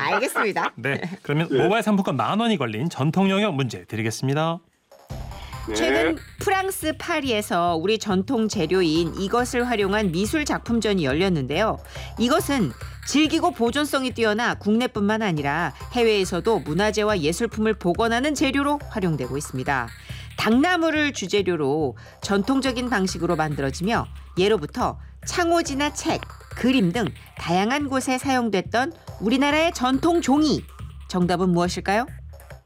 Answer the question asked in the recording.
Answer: 한지! 한지! 정답이었습니다.